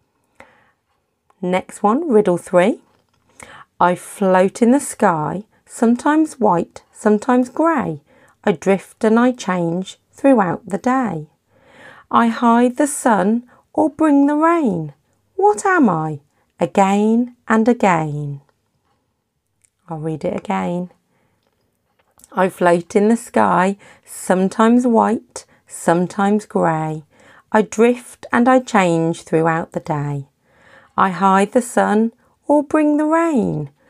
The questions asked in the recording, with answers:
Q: What am I? Again and again.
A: the answer to that one was a cloud